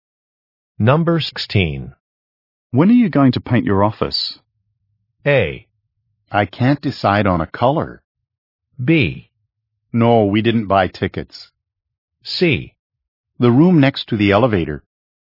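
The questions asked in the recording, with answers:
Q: When are you going to paint your office?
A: A: I can't decide on a color.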